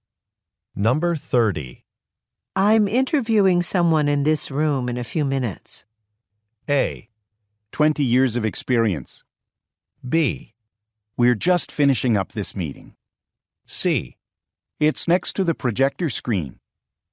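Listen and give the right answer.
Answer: B: We're just finishing up this meeting.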